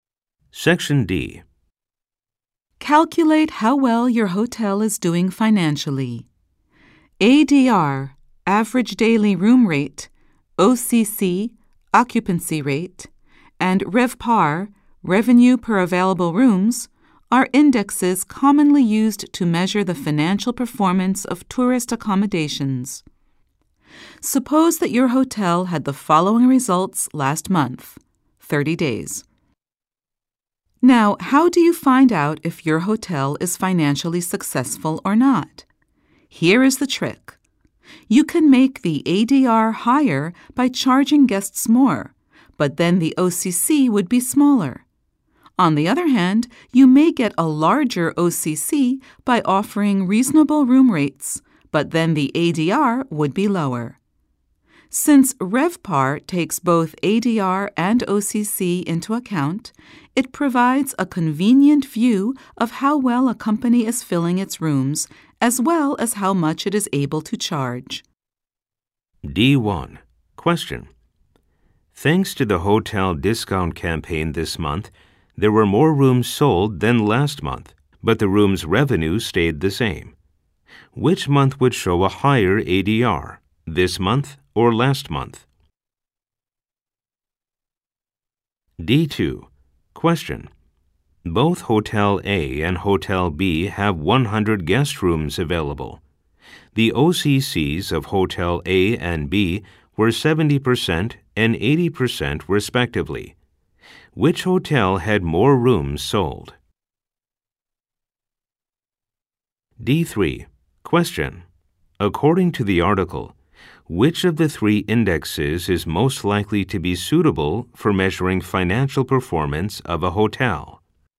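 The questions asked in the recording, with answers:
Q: Thanks to the hotel discount campaign this month, there were more rooms sold than last month, but the room's revenue stayed the same. Which month would show a higher ADR, this month or last month?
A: Last month

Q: Both Hotel A and Hotel B have 100 guest rooms available. The OCCs of Hotel A and B were 70% and 80% respectively. Which hotel had more rooms sold?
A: Hotel B

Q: According to the article, which of the three indexes is most likely to be suitable for measuring financial performance of a hotel?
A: RevPAR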